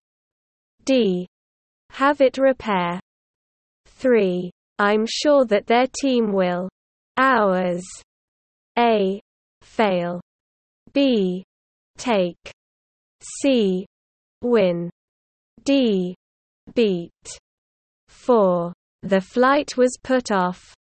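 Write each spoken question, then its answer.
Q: I'm sure that their team will. Hours.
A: D: Beat.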